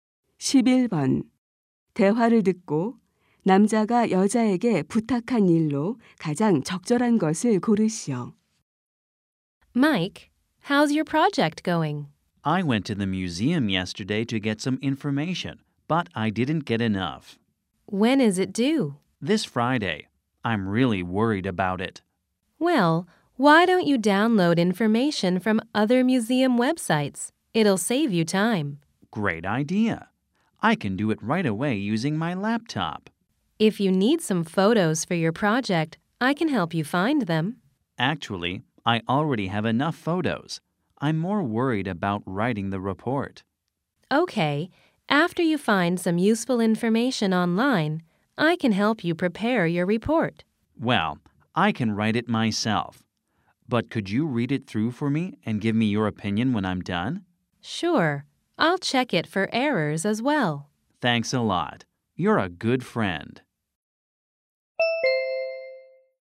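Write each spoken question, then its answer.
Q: 대화를 듣고 남자가 여자에게 부탁한 일로 가장 적절한 것을 고르시오.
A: 보고서를 읽고 의견 주기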